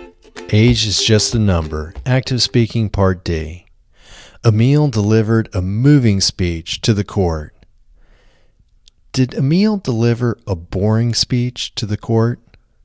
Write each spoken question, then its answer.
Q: Did Emile deliver a boring speech to the court?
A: No, Emile didn't deliver a boring speech to the court.